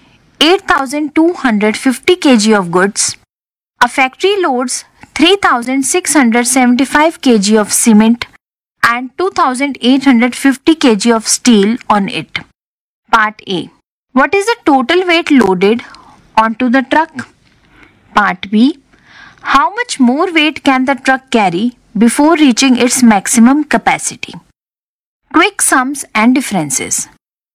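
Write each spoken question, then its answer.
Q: What is the total weight loaded onto the truck?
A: 6,525 kg

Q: How much more weight can the truck carry before reaching its maximum capacity?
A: 1,725 kg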